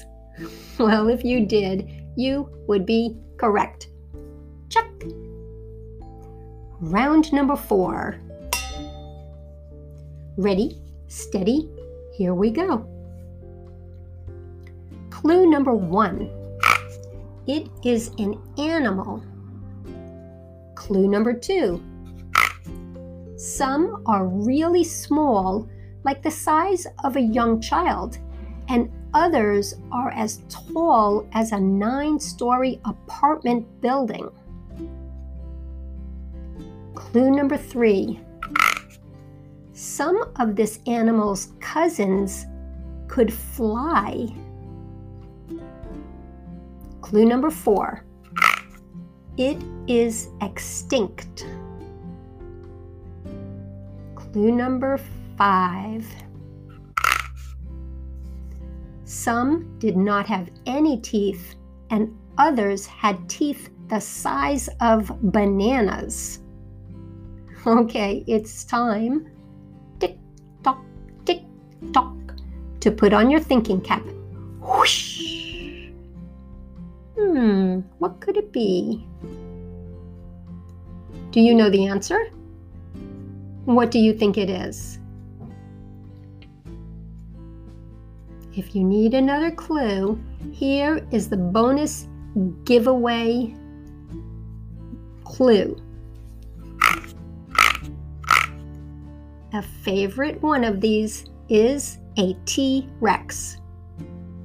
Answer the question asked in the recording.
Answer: Did you say dinosaur?